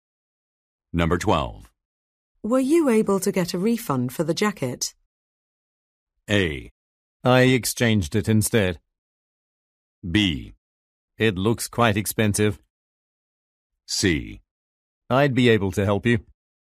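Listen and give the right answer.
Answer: A: I exchanged it instead.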